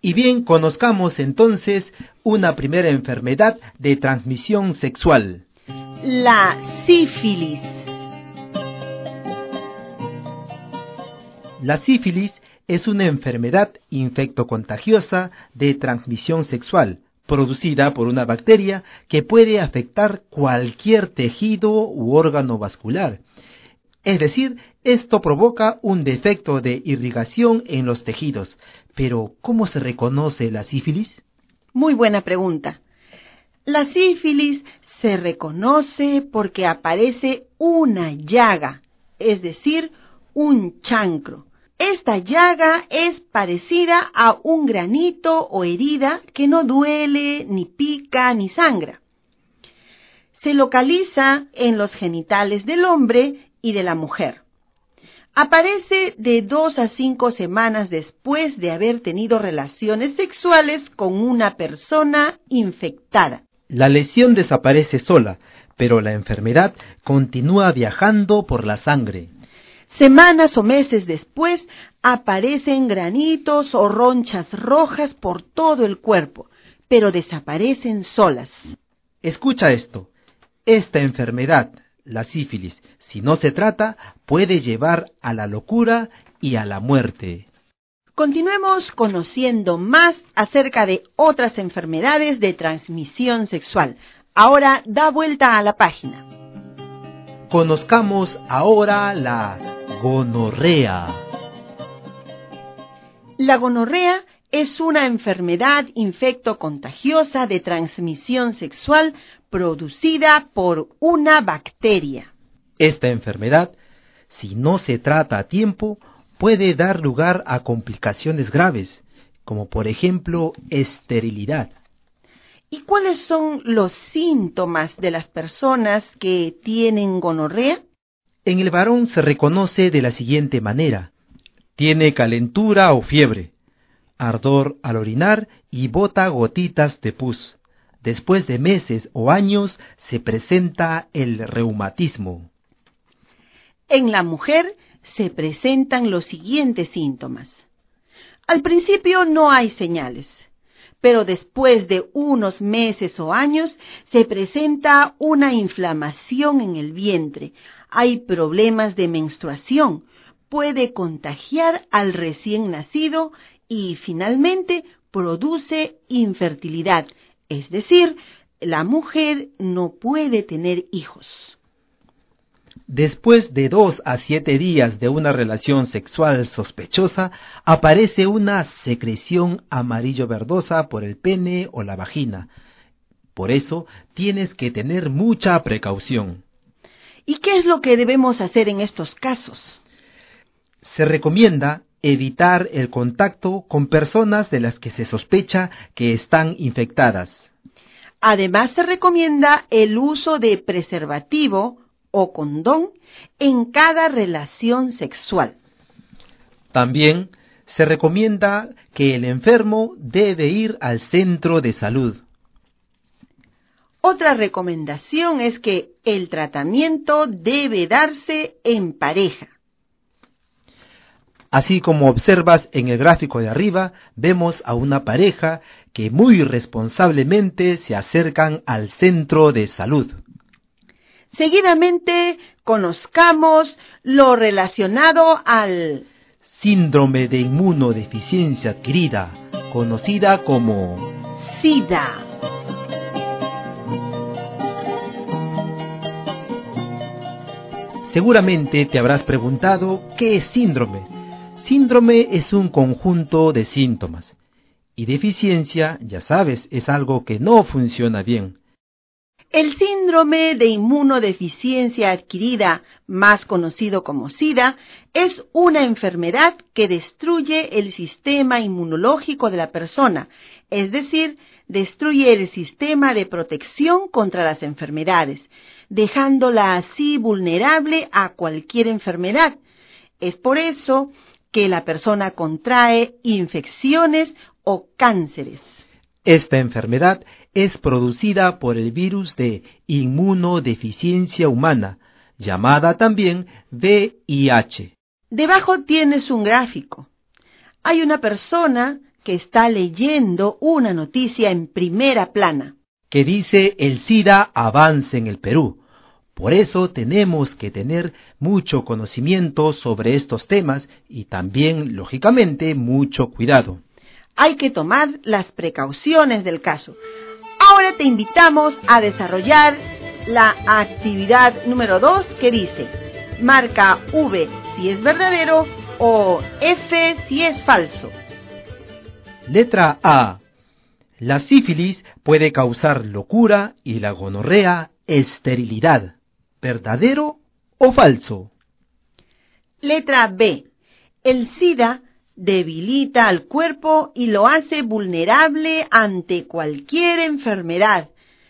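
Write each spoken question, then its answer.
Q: La sífilis puede causar locura y la gonorrea esterilidad.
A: Verdadero

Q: El SIDA debilita al cuerpo y lo hace vulnerable ante cualquier enfermedad.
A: Verdadero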